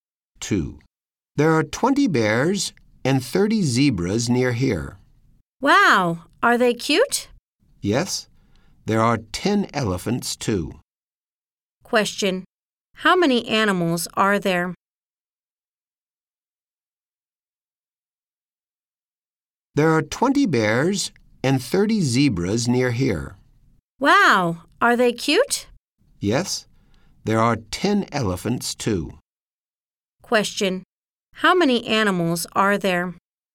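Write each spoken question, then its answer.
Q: Question. How many animals are there?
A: 60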